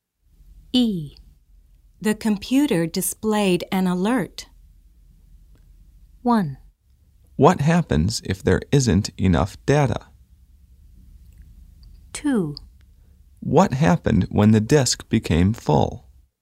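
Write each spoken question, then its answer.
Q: The computer displayed an alert.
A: 2: What happened when the disk became full?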